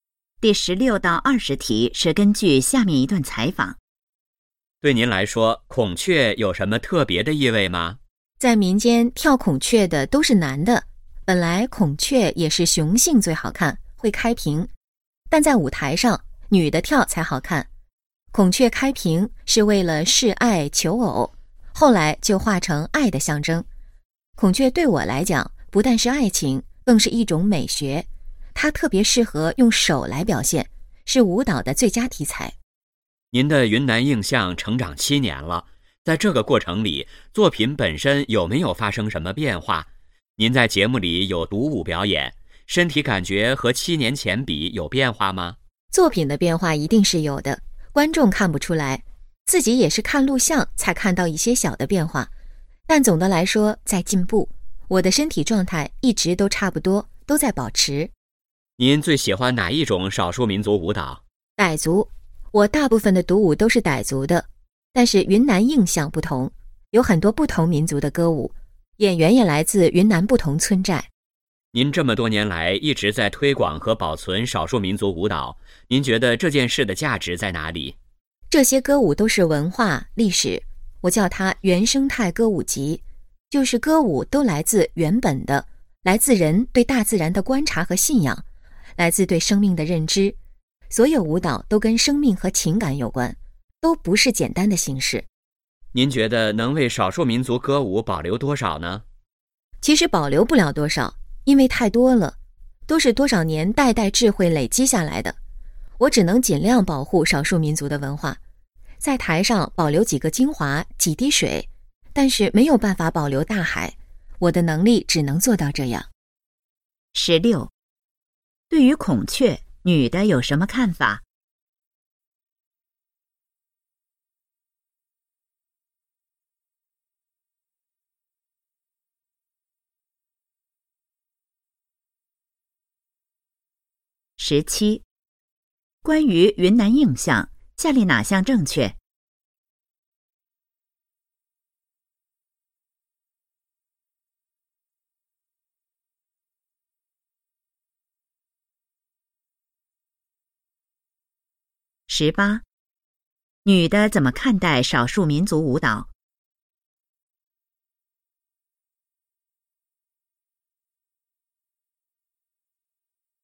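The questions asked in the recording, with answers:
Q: 对于孔雀女的有什么看法?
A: 不但代表爱情,更是一种美学,是舞蹈的最佳题材

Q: 女的怎么看待少数民族舞蹈?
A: 是文化历史,都跟生命和情感有关

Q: 女的说没有办法保留大海是什么意思?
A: 少数民族歌舞太多,只能保留少数精华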